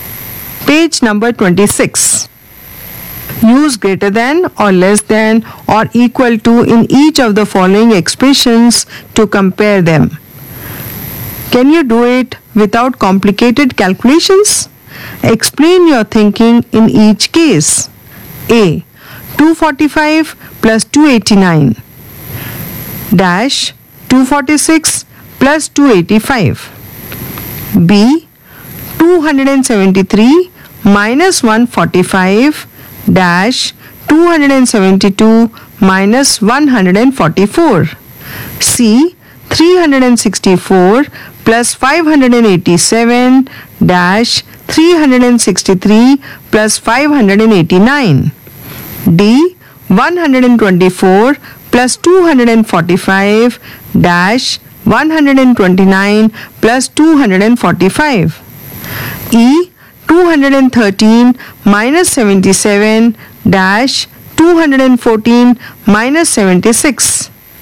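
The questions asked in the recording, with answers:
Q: 245 plus 289 dash 246 plus 285.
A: greater than (534 > 531)

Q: 273 minus 145 dash 272 minus 144.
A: equal to (128 = 128)

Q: 364 plus 587 dash 363 plus 589.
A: less than (951 < 952)

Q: 124 plus 245 dash 129 plus 245.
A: less than (369 < 374)

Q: 213 minus 77 dash 214 minus 76.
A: less than (136 < 138)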